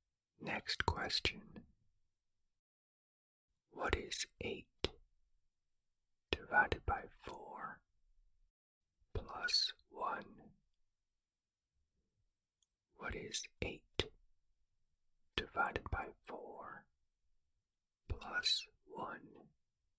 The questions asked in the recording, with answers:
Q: What is 8 divided by 4 plus 1?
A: The answer is 3.